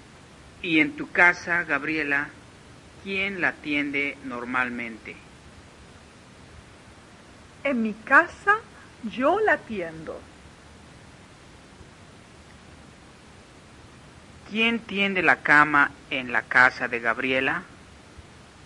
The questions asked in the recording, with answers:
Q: ¿Quién tiende la cama en la casa de Gabriela?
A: Gabriela tiende la cama. O la tiende Gabriela.